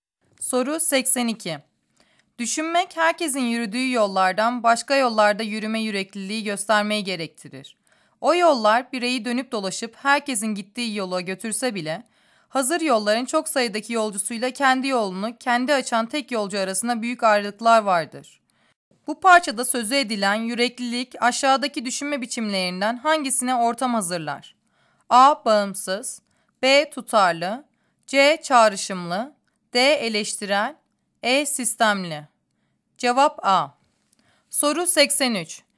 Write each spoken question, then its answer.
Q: Bu parçada sözü edilen yüreklilik aşağıdaki düşünme biçimlerinden hangisine ortam hazırlar?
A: Cevap A.